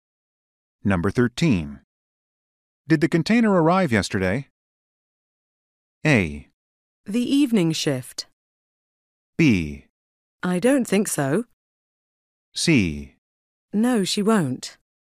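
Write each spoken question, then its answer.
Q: Did the container arrive yesterday?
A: B: I don't think so.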